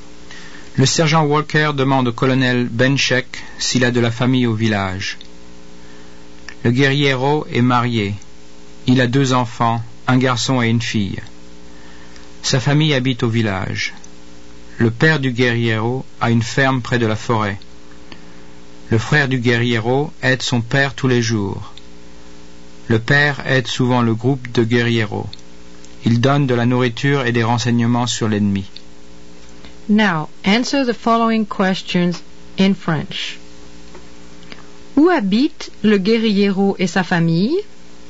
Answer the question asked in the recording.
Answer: Le guérillero et sa famille habitent au village.